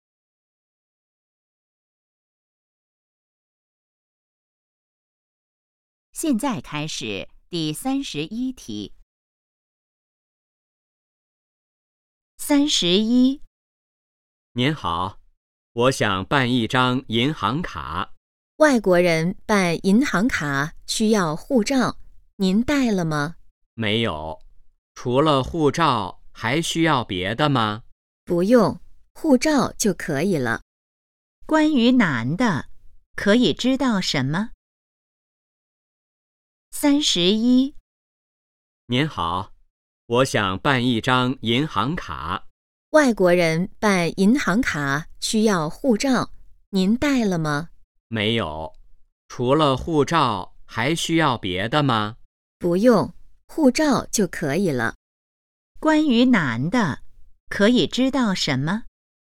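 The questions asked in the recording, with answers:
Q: 关于男的,可以知道什么?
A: 他没带护照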